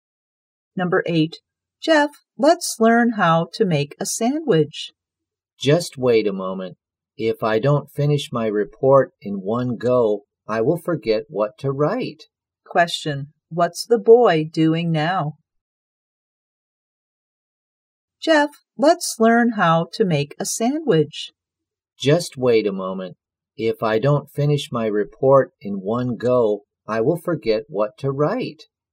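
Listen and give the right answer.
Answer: Writing his report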